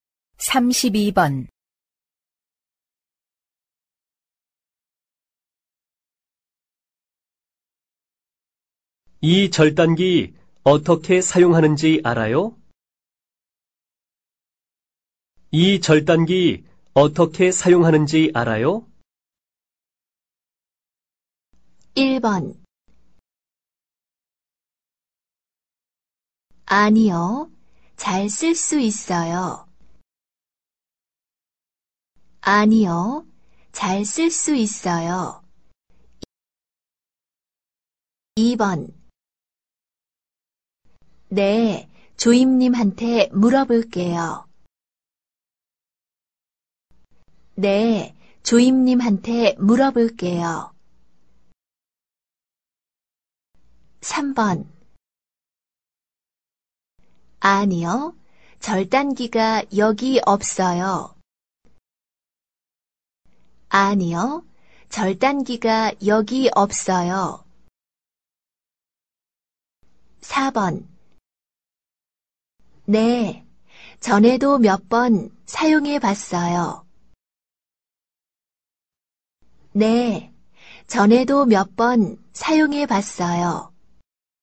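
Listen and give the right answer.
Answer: 4: 네, 전에도 몇 번 사용해 봤어요.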